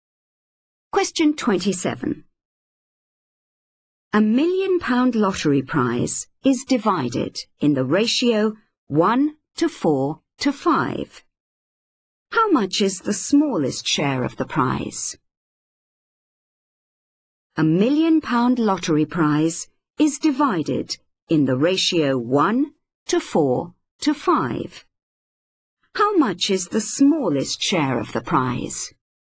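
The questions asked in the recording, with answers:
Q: How much is the smallest share of the prize?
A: £100,000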